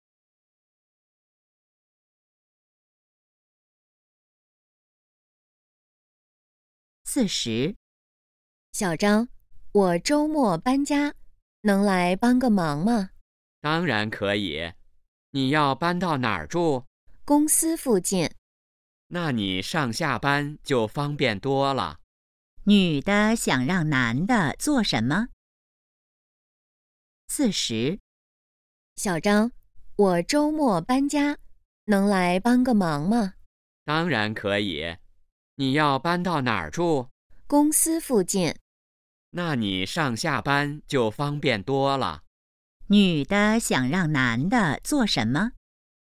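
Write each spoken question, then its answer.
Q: 女的想让男的做什么?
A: 周末帮忙搬家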